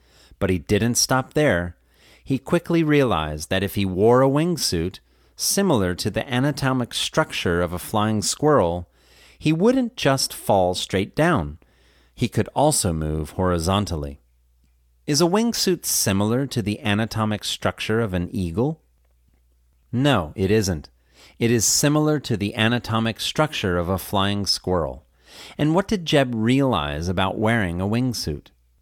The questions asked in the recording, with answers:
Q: And what did Jeb realize about wearing a wingsuit?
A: He realized he wouldn't just fall straight down, he could also move horizontally.